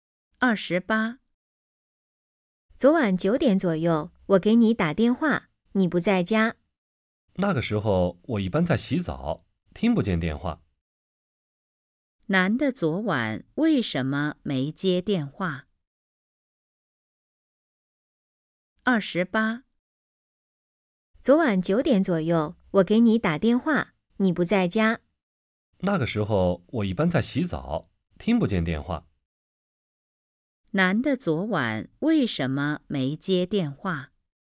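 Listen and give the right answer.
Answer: 在洗澡,听不见电话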